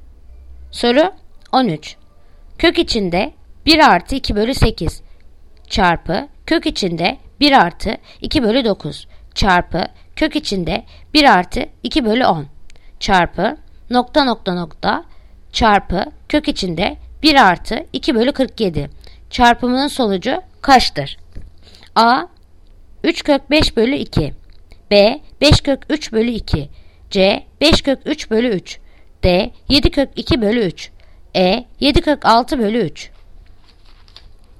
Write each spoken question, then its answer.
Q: Kök içinde 1 artı 2 bölü 8 çarpı kök içinde 1 artı 2 bölü 9 çarpı kök içinde 1 artı 2 bölü 10 çarpı nokta nokta nokta çarpı kök içinde 1 artı 2 bölü 47 çarpımının sonucu kaçtır?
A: Yanıt Edirne 7 kök 6 bölü 3.